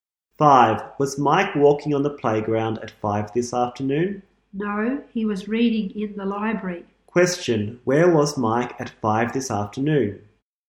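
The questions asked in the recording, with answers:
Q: where was Mike at 5 this afternoon?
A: In the library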